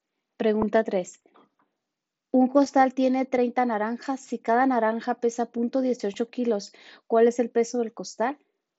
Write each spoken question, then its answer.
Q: Un costal tiene 30 naranjas. Si cada naranja pesa 0.18 kilos, ¿cuál es el peso del costal?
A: Y la respuesta correcta es la B, 5.4 kilos.